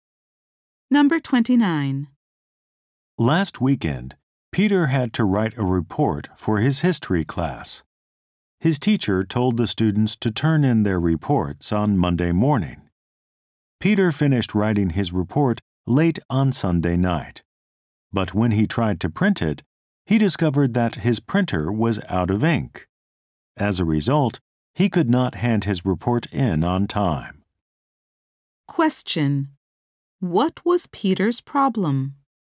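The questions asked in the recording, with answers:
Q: What was Peter's problem?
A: His printer was out of ink, so he couldn't hand in his report on time.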